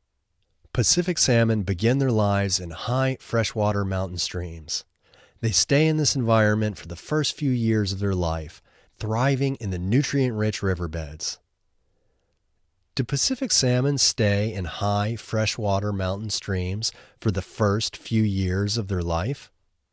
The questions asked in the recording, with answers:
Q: Do Pacific salmon stay in high freshwater mountain streams for the first few years of their life?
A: Yes, Pacific salmon stay in high freshwater mountain streams for the first few years of their life.